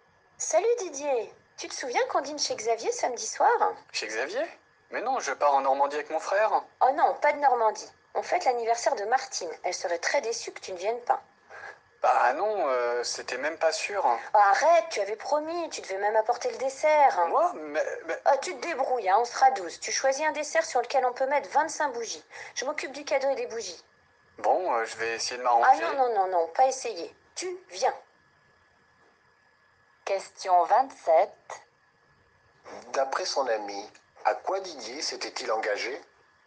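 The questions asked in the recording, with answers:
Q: D'après son ami, à quoi Didier s'était-il engagé?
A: À venir au dîner chez Xavier et à apporter le dessert.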